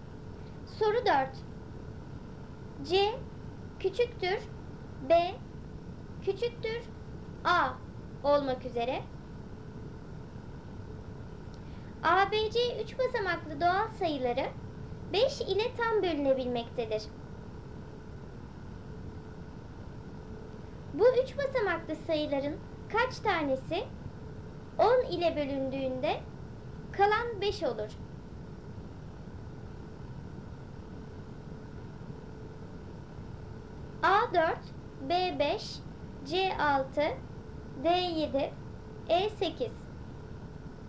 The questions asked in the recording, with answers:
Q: 10 ile bölündüğünde kalan 5 olur.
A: Doğru cevap C 6.